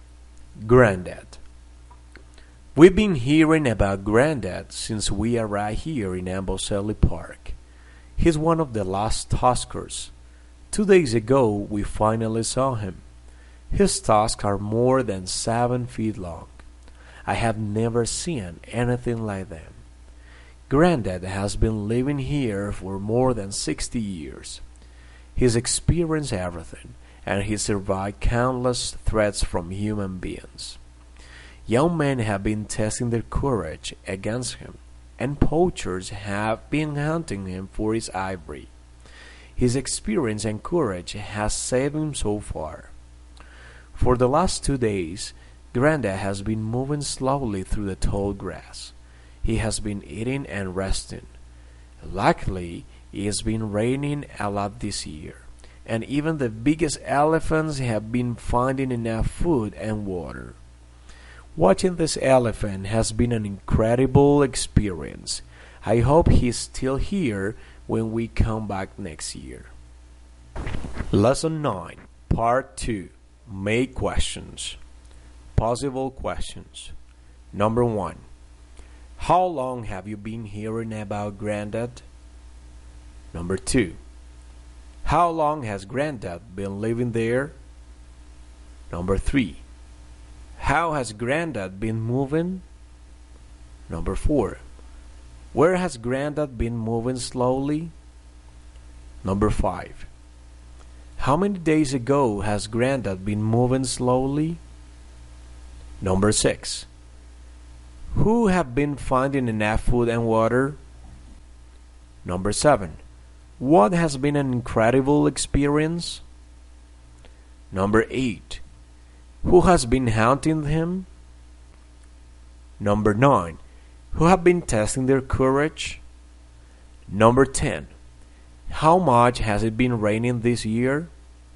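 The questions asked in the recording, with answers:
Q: How long have you been hearing about Granddad?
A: Since we arrived in Amboseli Park

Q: How long has Granddad been living there?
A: For more than 60 years

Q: How has Granddad been moving?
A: Slowly

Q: Where has Granddad been moving slowly?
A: Through the tall grass

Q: Who have been finding enough food and water?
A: Even the biggest elephants

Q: What has been an incredible experience?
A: Watching this elephant

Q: Who has been hunting him?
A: Poachers

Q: Who have been testing their courage?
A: Young men

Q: How much has it been raining this year?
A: A lot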